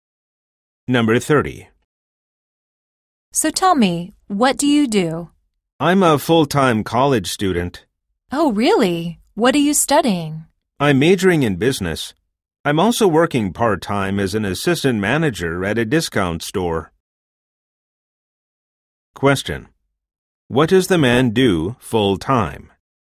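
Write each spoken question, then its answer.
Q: What does the man do full-time?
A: He is a college student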